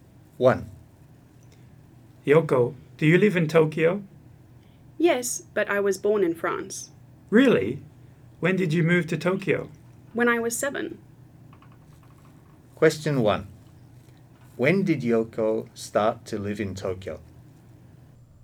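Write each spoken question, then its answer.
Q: When did Yoko start to live in Tokyo?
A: When she was 7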